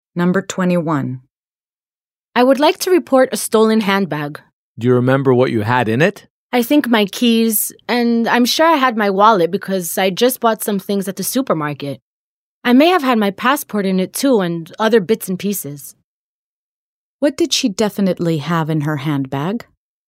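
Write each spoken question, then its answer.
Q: What did she definitely have in her handbag?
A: her wallet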